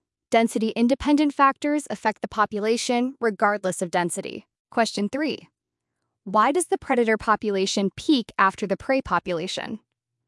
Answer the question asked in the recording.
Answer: Because of a reproductive delay, it takes time for predators to breed and raise offspring in response to increased food availability.